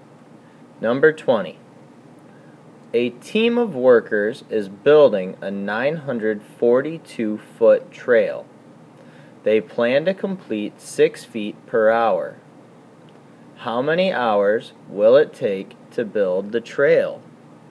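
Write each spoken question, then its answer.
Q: How many hours will it take to build the trail?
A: 157 hours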